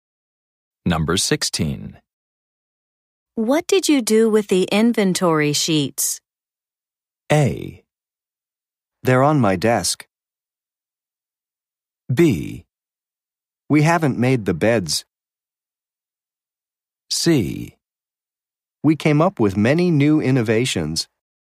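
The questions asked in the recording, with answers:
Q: What did you do with the inventory sheets?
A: A: They're on my desk.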